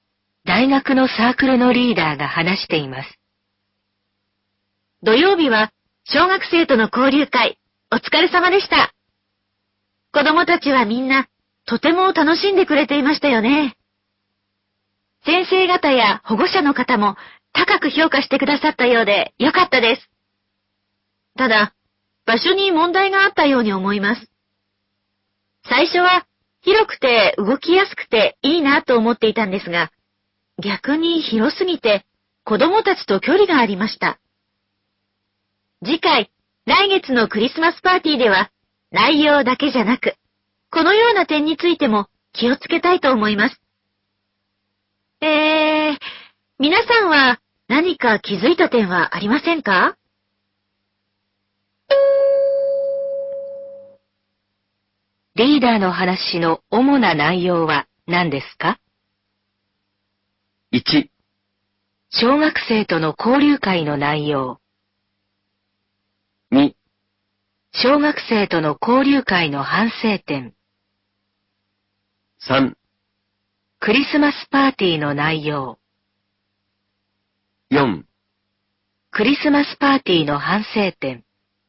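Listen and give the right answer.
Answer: 2: 小学生との交流会の反省点。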